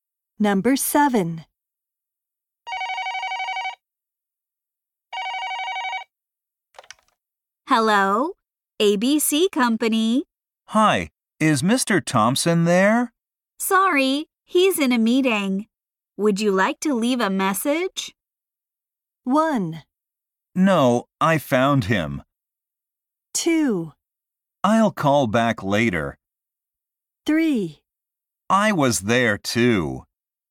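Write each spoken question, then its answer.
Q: Sorry, he's in a meeting. Would you like to leave a message?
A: 2: I'll call back later.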